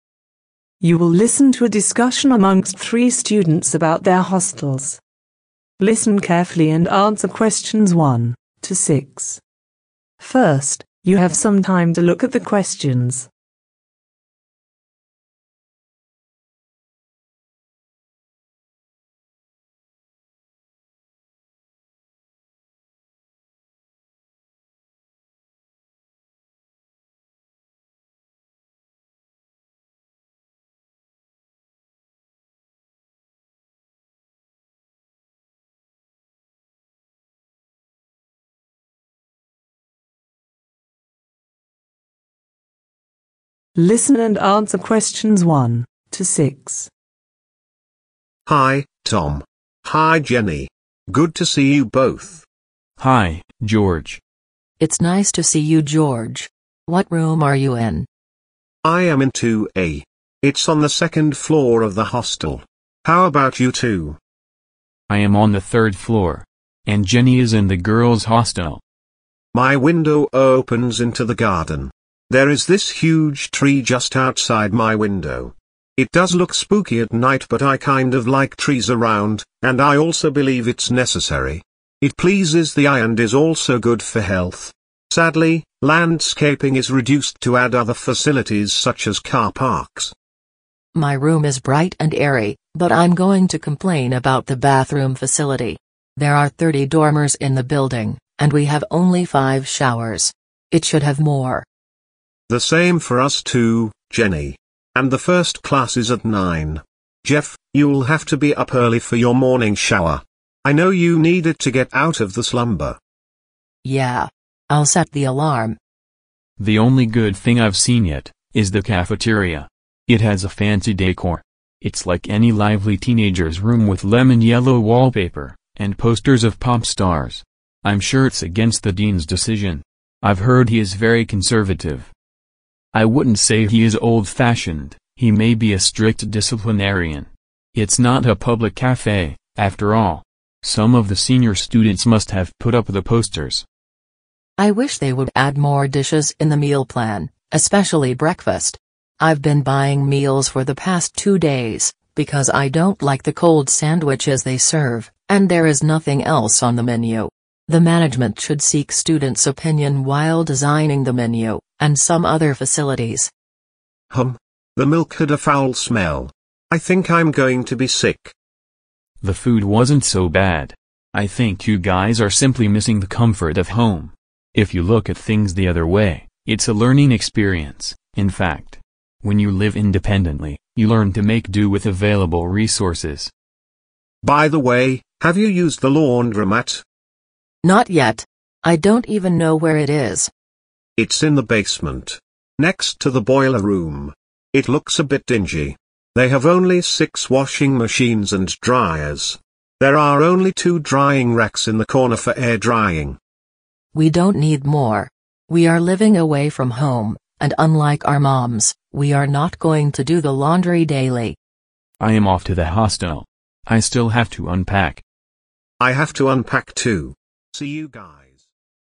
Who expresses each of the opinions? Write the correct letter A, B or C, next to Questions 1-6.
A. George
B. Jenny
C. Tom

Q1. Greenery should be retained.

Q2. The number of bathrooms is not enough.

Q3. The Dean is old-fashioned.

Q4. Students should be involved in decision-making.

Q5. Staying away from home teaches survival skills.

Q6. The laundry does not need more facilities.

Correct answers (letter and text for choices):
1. A. George
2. B. Jenny
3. C. Tom
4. B. Jenny
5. C. Tom
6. B. Jenny